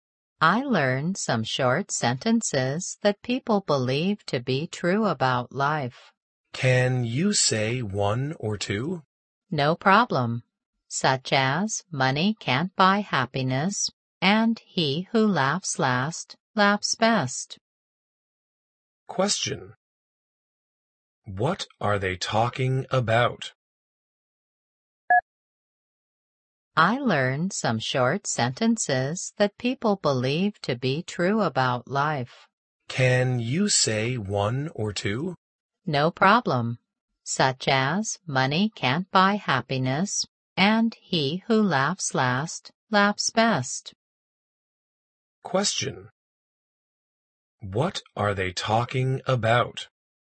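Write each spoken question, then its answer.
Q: What are they talking about?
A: Sayings about life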